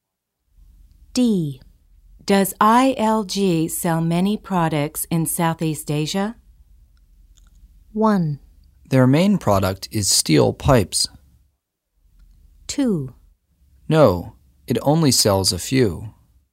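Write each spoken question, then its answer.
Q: Does ILG sell many products in Southeast Asia?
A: 2: No, it only sells a few.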